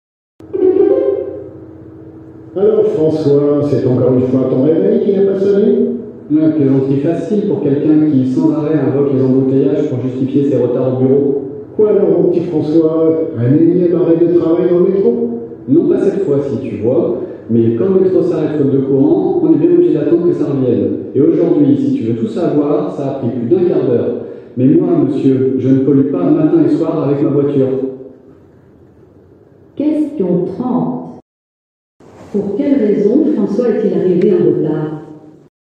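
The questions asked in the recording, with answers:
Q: Pour quelle raison François est-il arrivé en retard?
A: Le métro s'est arrêté faute de courant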